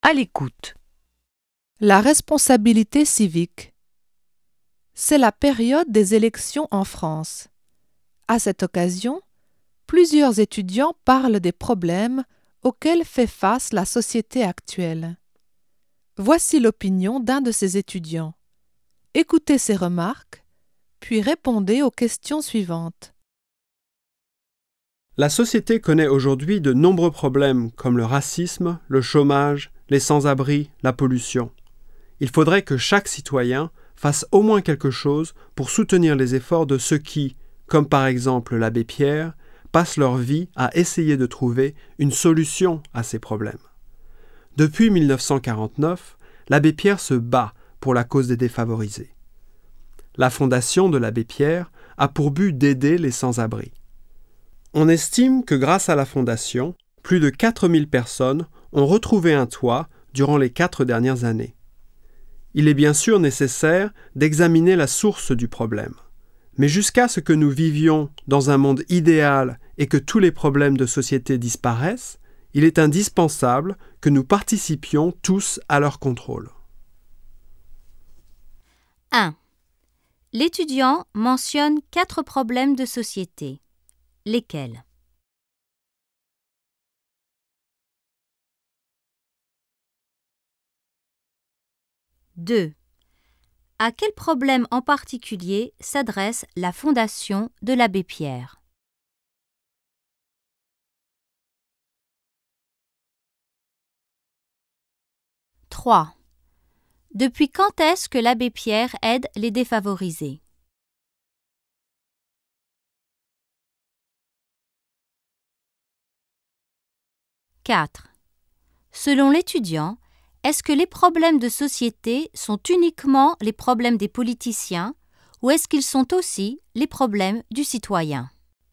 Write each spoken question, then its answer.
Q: L'étudiant mentionne 4 problèmes de société. Lesquels ?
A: Le racisme, le chômage, les sans-abri, la pollution.

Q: À quel problème en particulier s'adresse la fondation de l'abbé Pierre ?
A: Au problème des sans-abri.

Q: Depuis quand est-ce que l'abbé Pierre aide les défavorisés ?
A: Depuis 1949.

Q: Selon l'étudiant, est-ce que les problèmes de société sont uniquement les problèmes des politiciens ou est-ce qu'ils sont aussi les problèmes du citoyen?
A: Ils sont aussi les problèmes du citoyen.